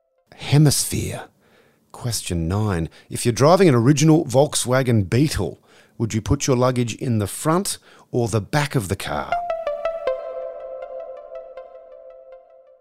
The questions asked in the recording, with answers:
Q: If you're driving an original Volkswagen Beetle, would you put your luggage in the front or the back of the car?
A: You put it in the front.